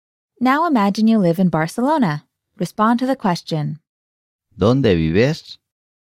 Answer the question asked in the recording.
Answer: Vivo en Barcelona.